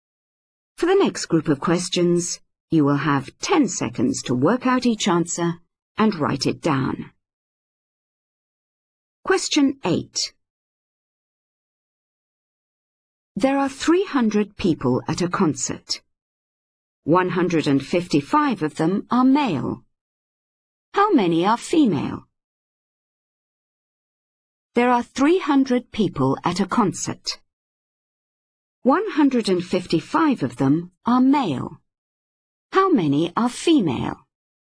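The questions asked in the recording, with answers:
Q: 155 of them are male. How many are female?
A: 145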